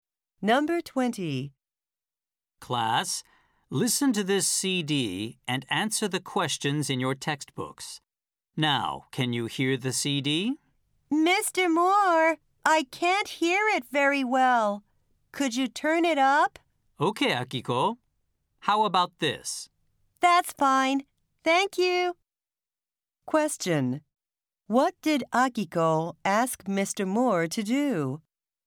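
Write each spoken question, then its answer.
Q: What did Akiko ask Mr. Moore to do?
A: To turn up the volume of the CD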